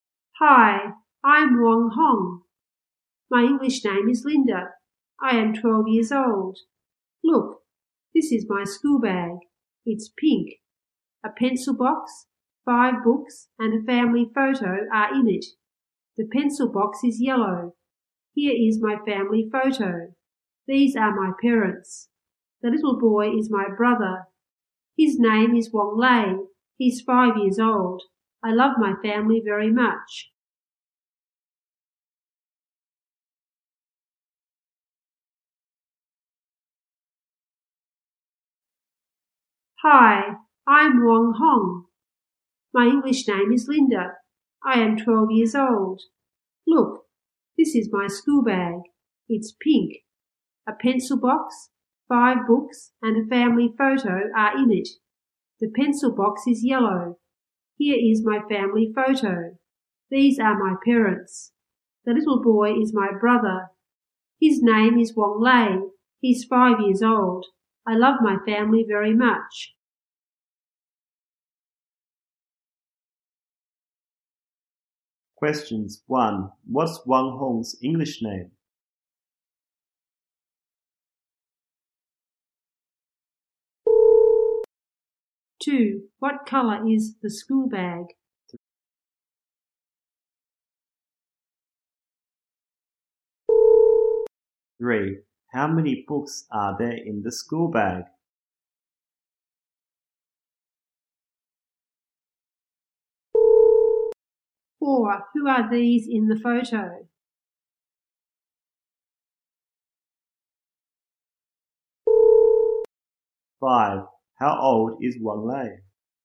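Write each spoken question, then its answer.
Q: What's Wong Hong's English name?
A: Linda

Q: what color is the school bag?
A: Pink

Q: how many books are there in the school bag?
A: Five

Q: who are these in the photo?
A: Her parents

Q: how old is Wong Lei?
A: 5 years old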